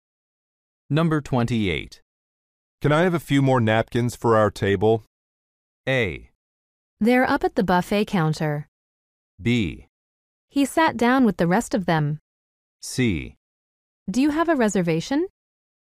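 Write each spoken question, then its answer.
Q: Can I have a few more napkins for our table?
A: A: They're up at the buffet counter.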